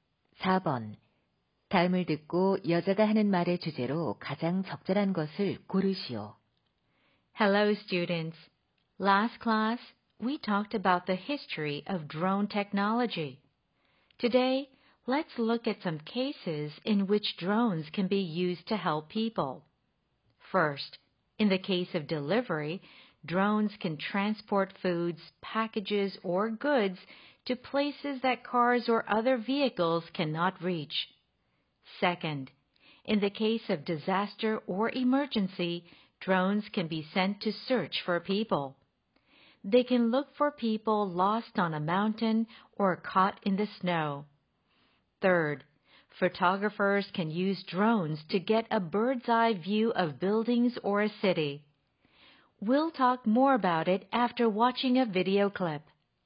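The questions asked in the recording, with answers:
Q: 다음을 듣고 여자가 하는 말의 주제로 가장 적절한 것을 고르시오.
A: 드론을 사람들을 돕는 데 활용하는 사례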